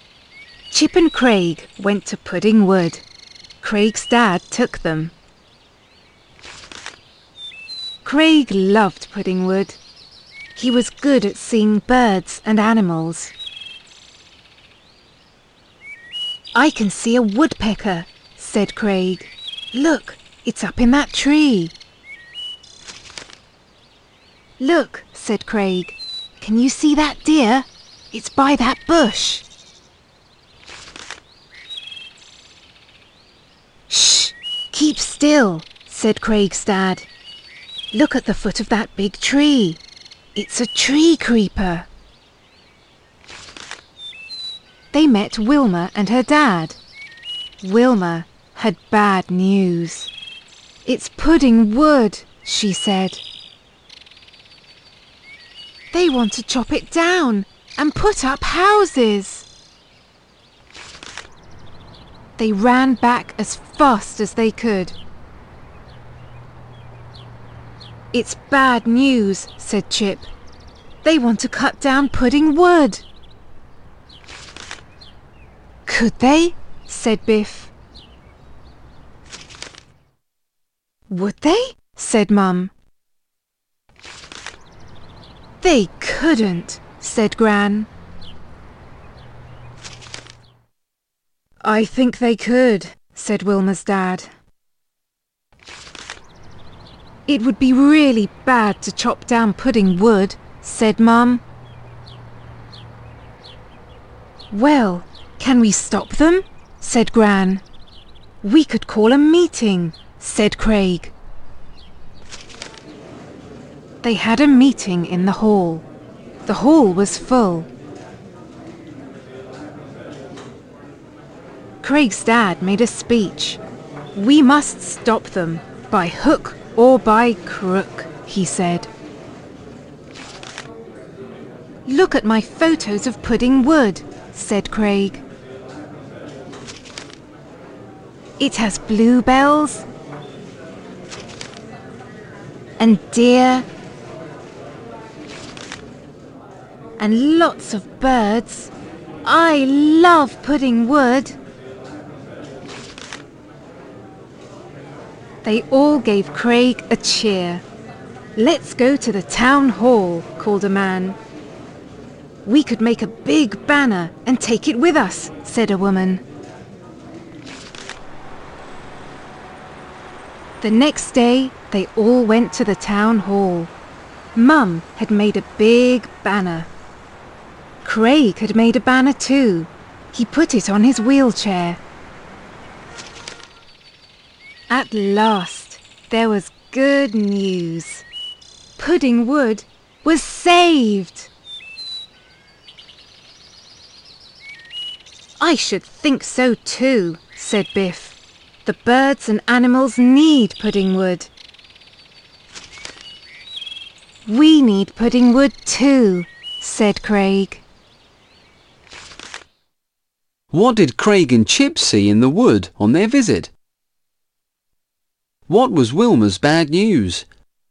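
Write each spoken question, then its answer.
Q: What did Craig and Chip see in the wood on their visit?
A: A woodpecker, a deer and a tree creeper

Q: What was Wilma's bad news?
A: They want to chop down Pudding Wood and put up houses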